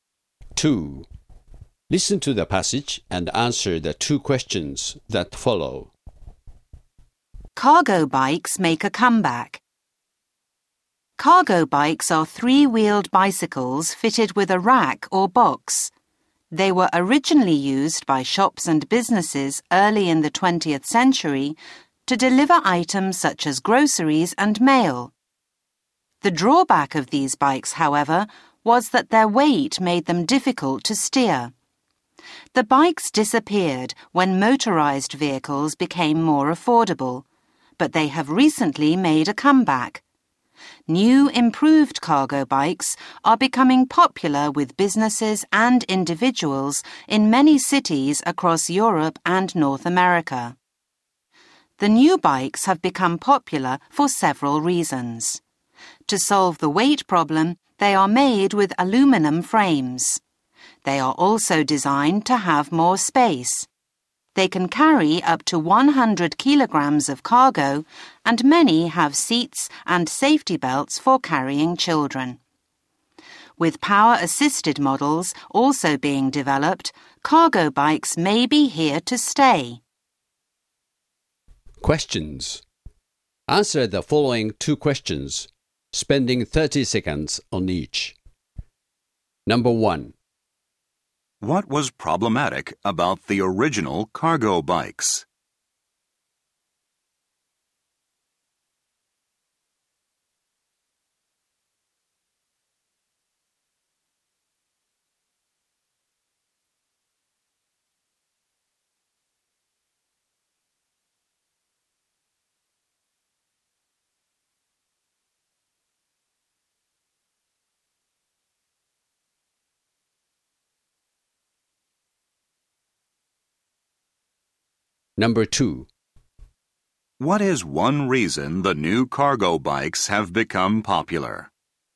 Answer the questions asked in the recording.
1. The cargo bikes, while useful, were too heavy to steer easily.
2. The new cargo bikes now benefit from